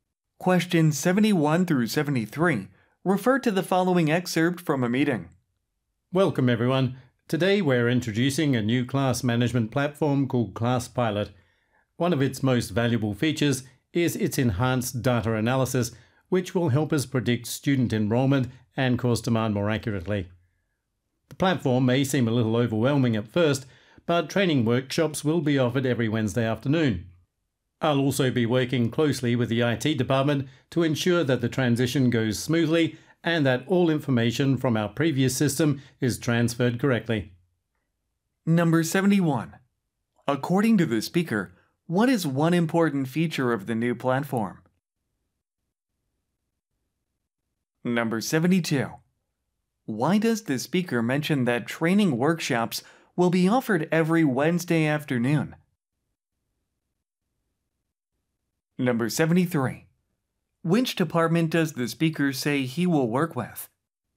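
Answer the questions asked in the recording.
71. Enhanced data analysis to predict enrollment and course demand
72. To reassure listeners, since the platform may seem overwhelming at first
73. The IT department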